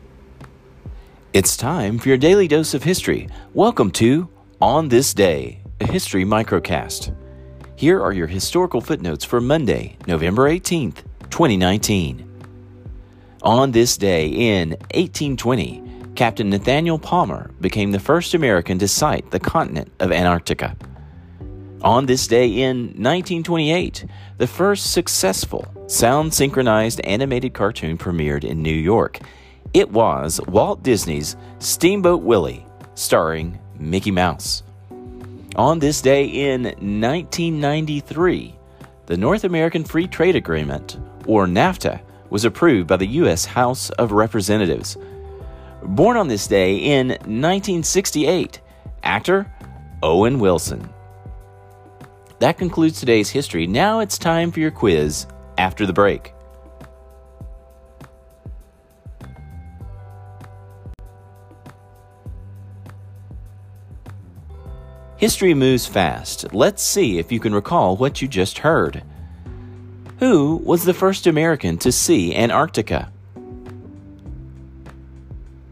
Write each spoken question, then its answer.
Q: Who was the first American to see Antarctica?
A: Captain Nathaniel Palmer.